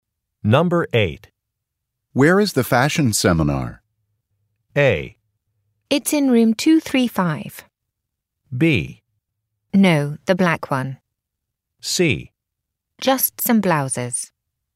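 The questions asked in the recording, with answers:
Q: Where is the fashion seminar?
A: A: It's in room 235.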